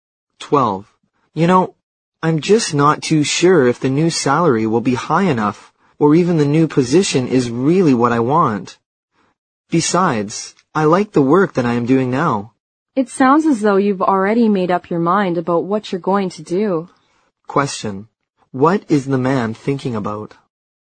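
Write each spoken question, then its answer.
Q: What is the man thinking about?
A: Whether to take a new job (change his job).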